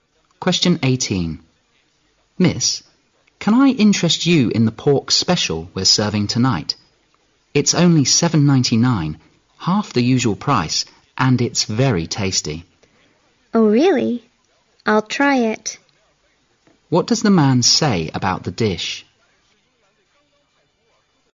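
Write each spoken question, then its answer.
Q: What does the man say about the dish?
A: It's half the usual price ($7.99) and very tasty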